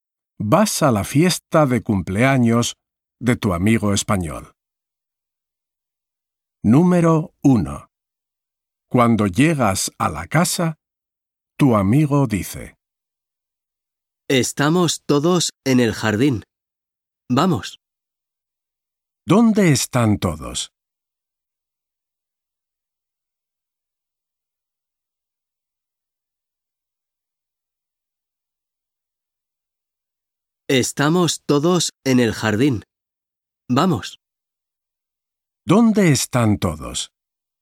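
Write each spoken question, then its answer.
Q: ¿Dónde están todos?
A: en el jardín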